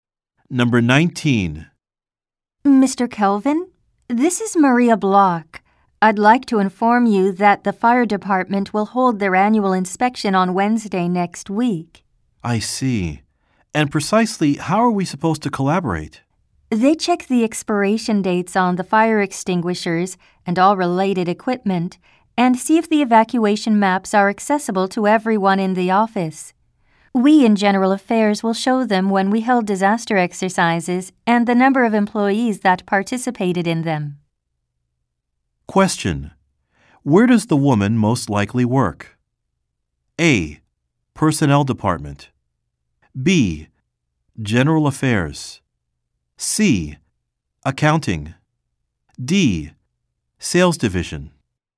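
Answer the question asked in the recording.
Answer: B: General Affairs.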